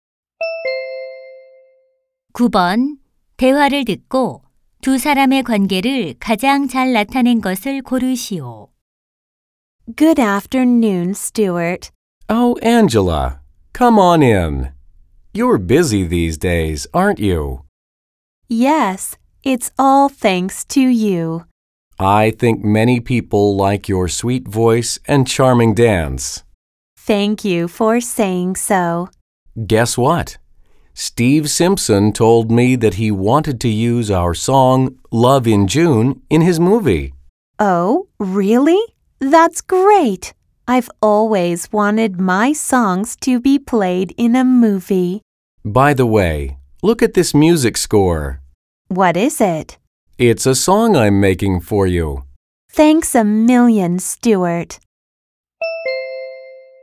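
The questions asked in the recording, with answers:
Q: 대화를 듣고 두 사람의 관계를 가장 잘 나타낸 것을 고르시오.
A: 가수 - 작곡가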